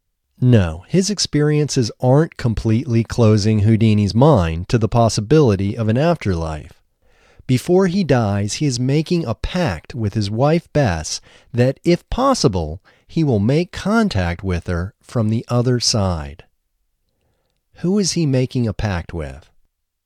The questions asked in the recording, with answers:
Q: Who is he making a pact with?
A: He is making a pact with his wife Bess.